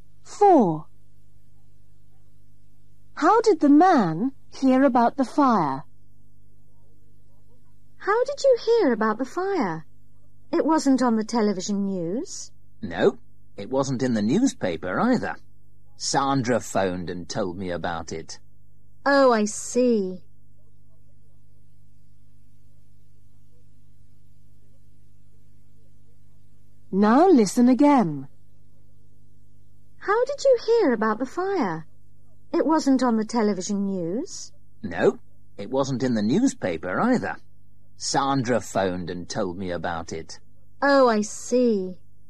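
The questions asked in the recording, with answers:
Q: How did the man hear about the fire?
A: Sandra phoned him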